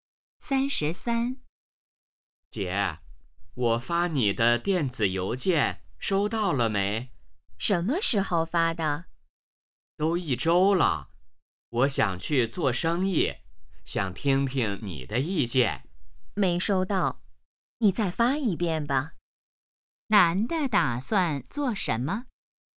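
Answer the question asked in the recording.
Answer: 做生意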